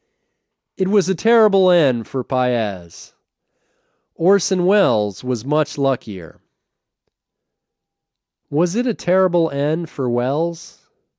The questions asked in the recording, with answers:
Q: Was it a terrible end for Welles?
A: No, it wasn't a terrible end for Welles.